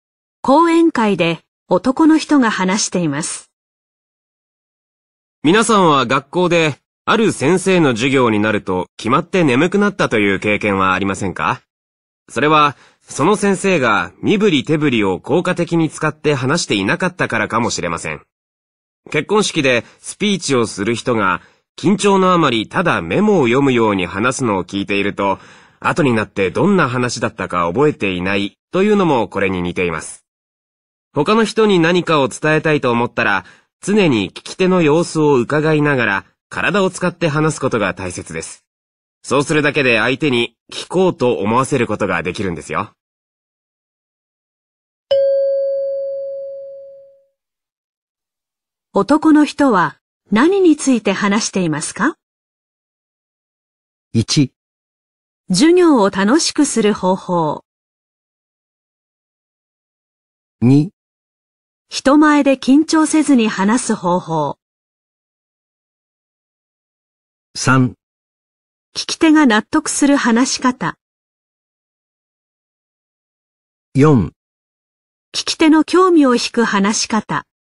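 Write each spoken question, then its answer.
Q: 男の人は何について話していますか?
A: 4: 聞き手の興味を引く話し方。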